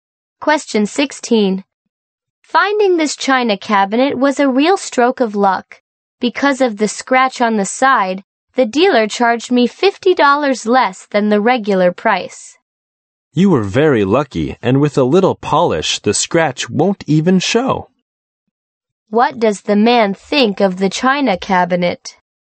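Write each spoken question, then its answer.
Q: What does the man think of the china cabinet?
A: It was a good bargain, and the scratch won't show after polishing.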